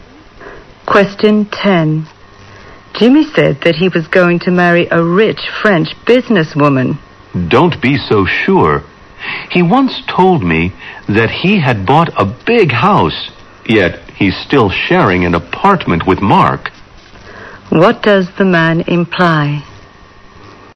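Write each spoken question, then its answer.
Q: What does the man imply?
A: What Jimmy says can't be trusted.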